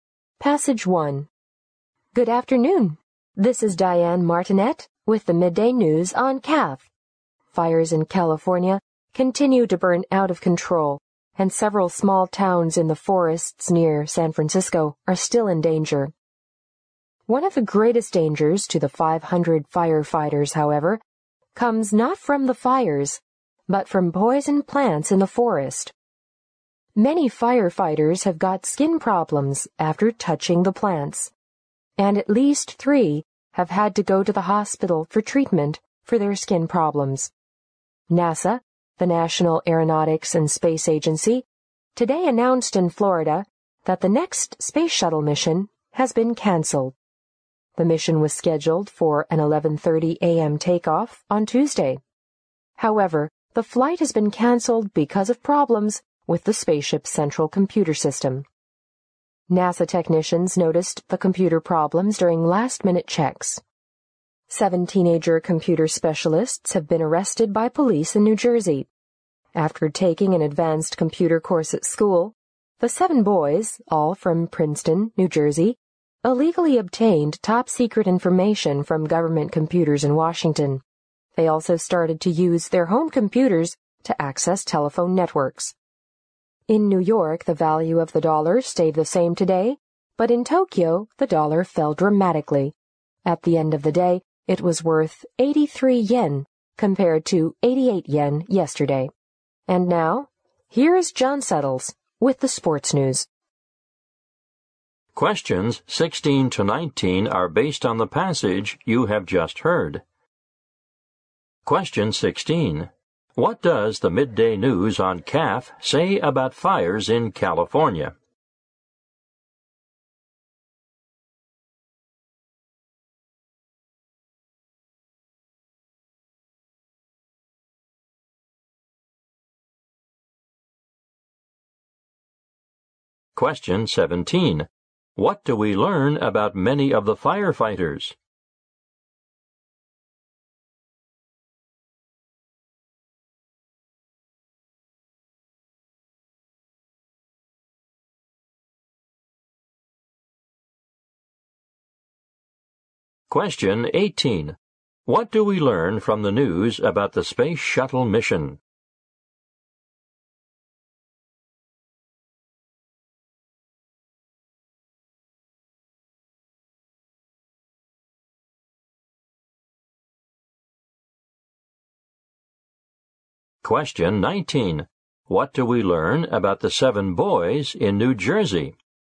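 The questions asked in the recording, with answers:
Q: What does the midday news on CAF say about fires in California?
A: They are still burning out of control and several small towns are in danger

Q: What do we learn about many of the firefighters?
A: They got skin problems from touching poison plants

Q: What do we learn from the news about the space shuttle mission?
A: It was canceled because of problems with the central computer system

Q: What do we learn about the 7 boys in New Jersey?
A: They illegally obtained top-secret information from government computers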